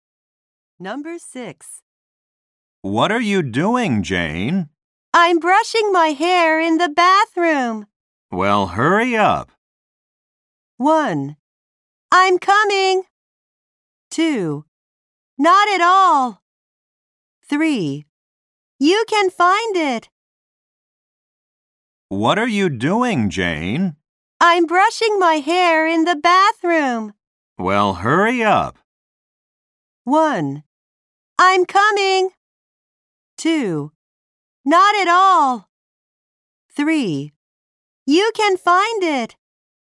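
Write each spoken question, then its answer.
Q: Well, hurry up.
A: 1: I'm coming.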